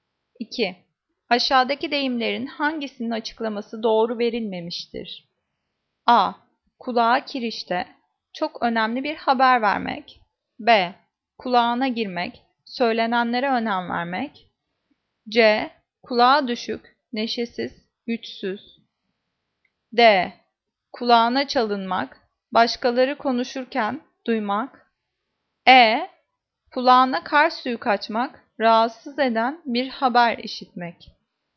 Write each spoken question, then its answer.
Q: Aşağıdaki deyimlerin hangisinin açıklaması doğru verilmemiştir?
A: Cevap A. Kulağa kirişte çok önemli bir haber vermek.